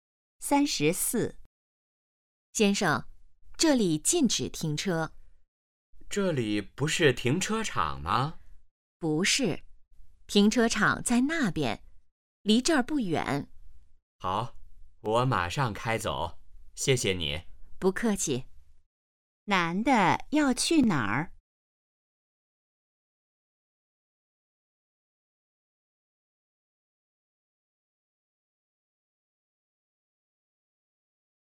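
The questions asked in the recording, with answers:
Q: 男的要去哪儿?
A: 停车场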